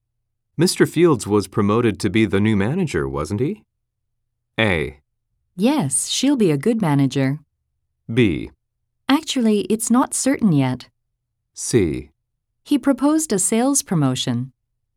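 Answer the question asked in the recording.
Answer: B: Actually, it's not certain yet.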